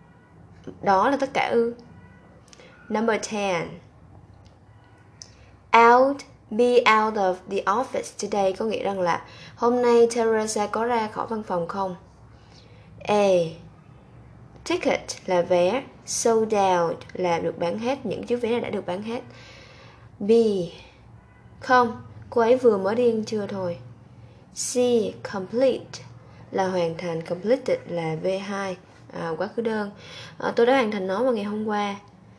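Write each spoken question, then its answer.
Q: Be out of the office today có nghĩa rằng là hôm nay Teresa có ra khỏi văn phòng không?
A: B: Không, cô ấy vừa mới đi ăn trưa thôi.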